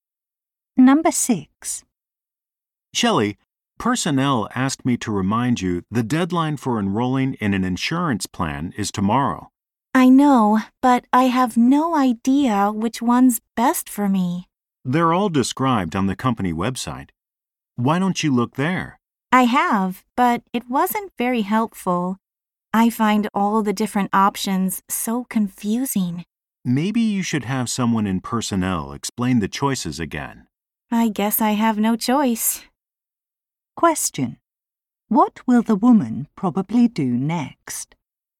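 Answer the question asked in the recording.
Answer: Ask someone in personnel to explain the insurance choices again.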